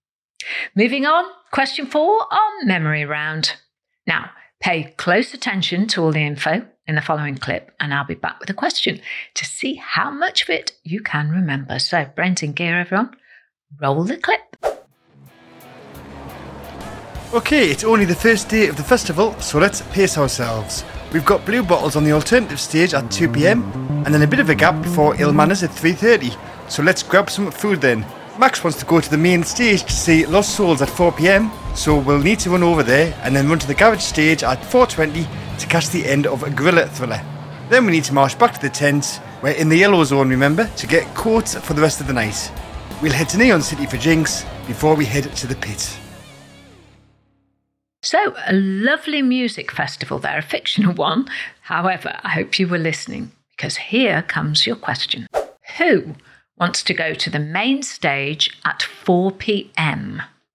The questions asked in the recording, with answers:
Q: Who wants to go to the main stage at 4 p.m?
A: And the answer was, Max wanted that.